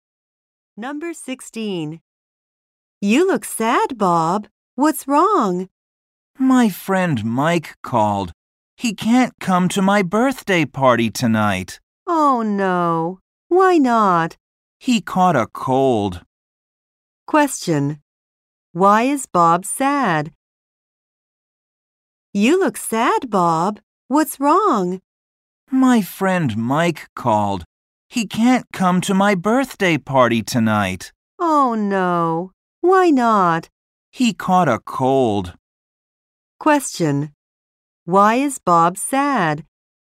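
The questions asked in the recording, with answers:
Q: Why is Bob sad?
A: Mike can't come to his birthday party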